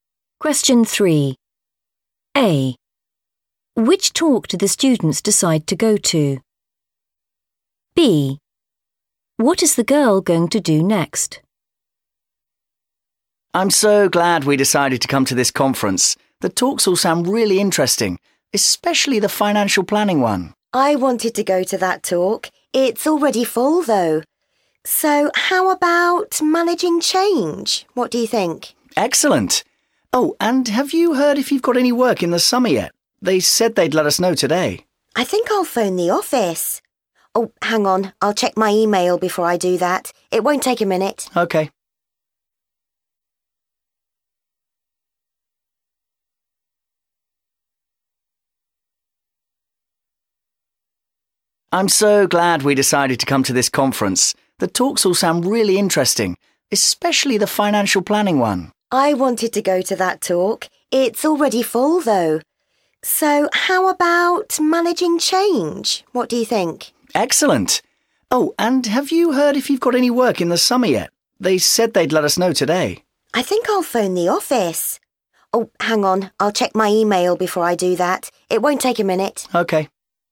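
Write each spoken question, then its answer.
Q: Which talk do the students decide to go to?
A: managing change

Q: What is the girl going to do next?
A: check her email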